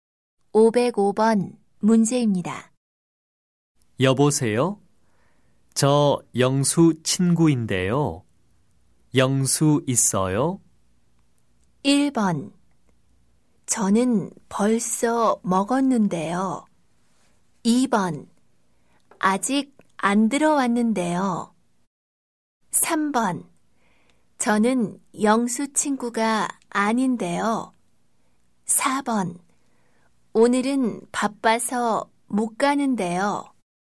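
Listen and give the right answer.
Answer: 2: 아직 안 들어왔는데요.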